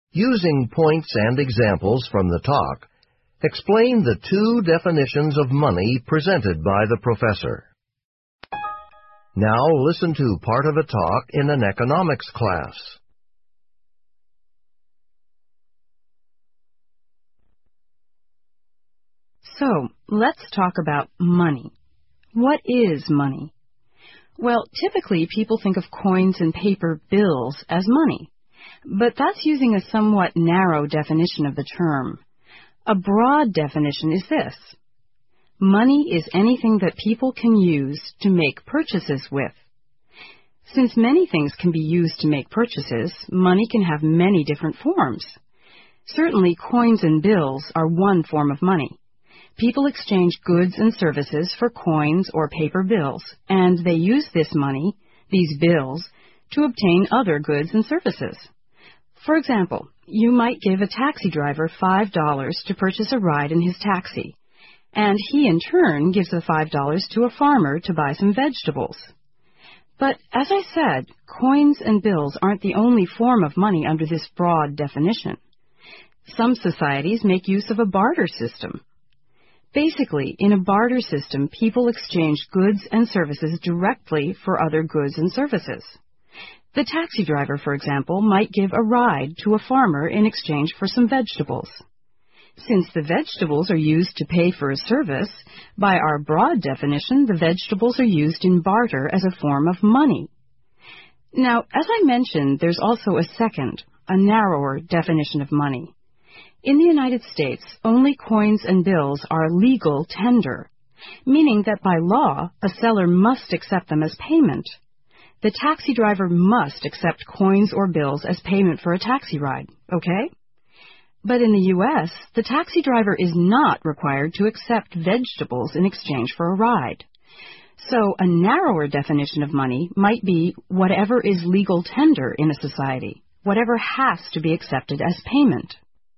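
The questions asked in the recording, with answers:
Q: Using points and examples from the talk, explain the two definitions of money presented by the professor.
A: Broad definition: money is anything people can use to make purchases, like coins and bills, or vegetables traded for a taxi ride in a barter system. Narrow definition: money is whatever is legal tender, meaning sellers must accept it as payment by law. In the U.S. only coins and bills are legal tender, so a taxi driver must accept them but not vegetables.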